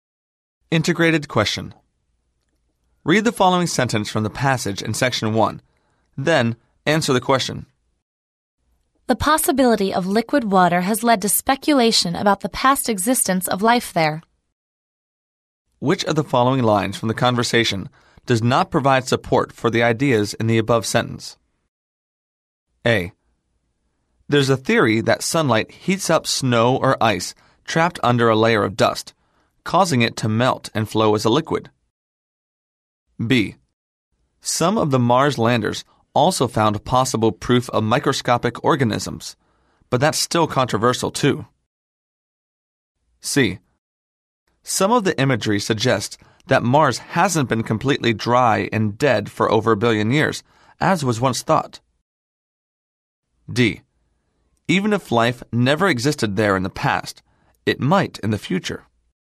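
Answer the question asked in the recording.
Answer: D: Even if life never existed there in the past, it might in the future.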